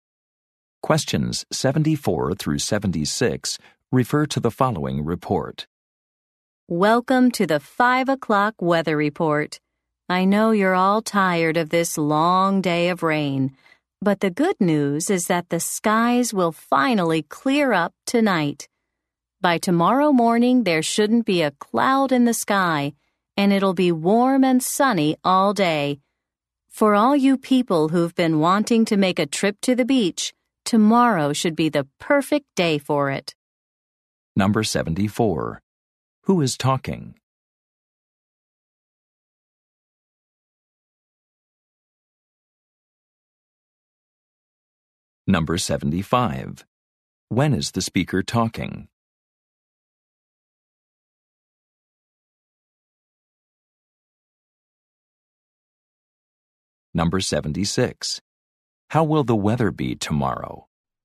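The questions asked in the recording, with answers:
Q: Who is talking?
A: A weather reporter

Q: When is the speaker talking?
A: At 5 o'clock

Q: How will the weather be tomorrow?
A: Warm and sunny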